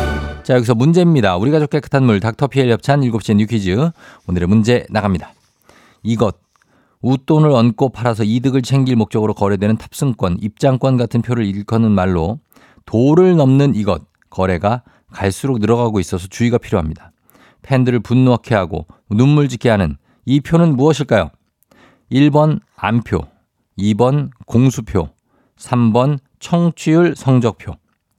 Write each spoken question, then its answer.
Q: 팬들을 분노하게 하고 눈물 짓게 하는 이 표는 무엇일까요?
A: 정답 1번 안표입니다.